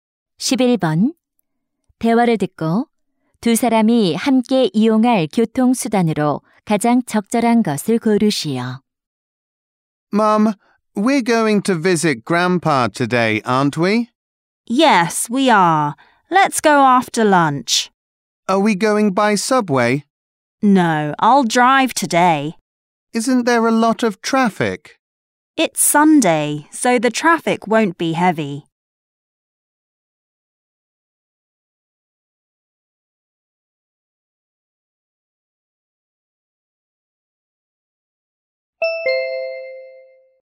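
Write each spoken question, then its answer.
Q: 대화를 듣고 두 사람이 함께 이용할 교통수단으로 가장 적절한 것을 고르시오.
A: 자동차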